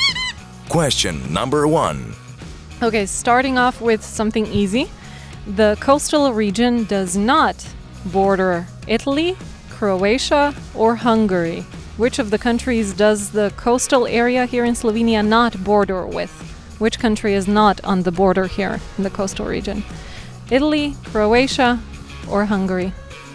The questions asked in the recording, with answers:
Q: Which country is not on the border here in the coastal region?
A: Hungary does not border this region.